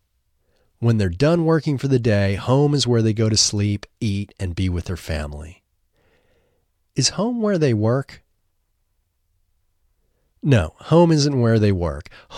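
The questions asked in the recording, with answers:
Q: Is home where they work?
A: No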